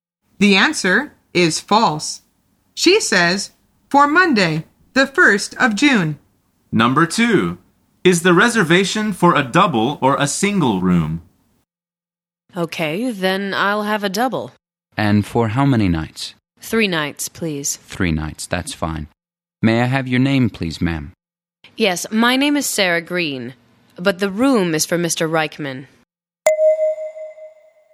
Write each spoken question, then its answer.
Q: Is the reservation for a double or a single room?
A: The answer is a double.